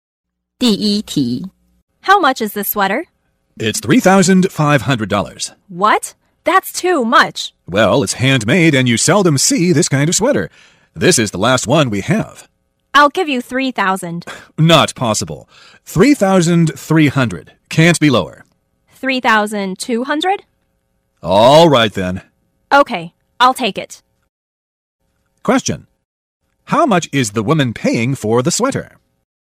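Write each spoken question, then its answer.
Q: How much is the woman paying for the sweater?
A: $3,200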